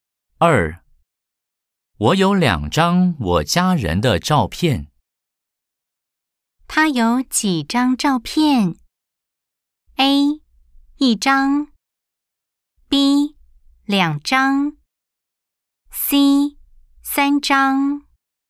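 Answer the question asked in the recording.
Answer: B: 两张。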